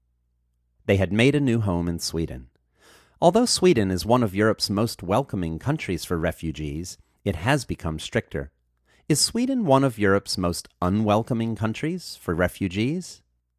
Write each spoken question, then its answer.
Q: Is Sweden one of Europe's most unwelcoming countries for refugees?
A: No, Sweden is not one of Europe's most unwelcoming countries for refugees.